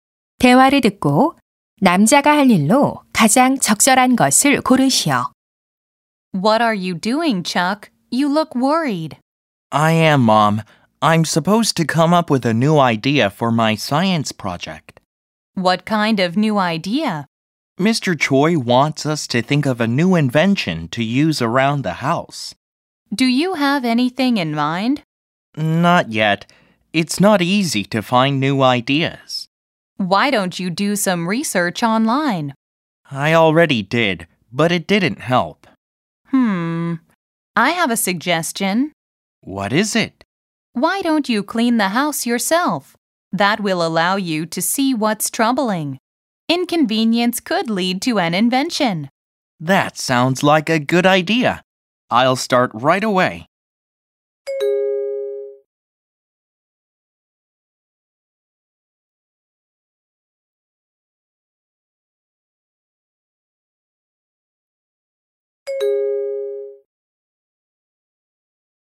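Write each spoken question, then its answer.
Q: 7번 대화를 듣고 남자가 할 일로 가장 적절한 것을 고르시오.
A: 집 청소하기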